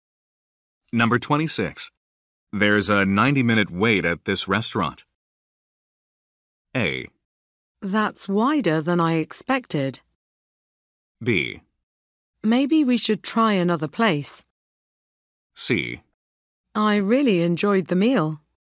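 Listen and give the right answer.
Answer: B: Maybe we should try another place.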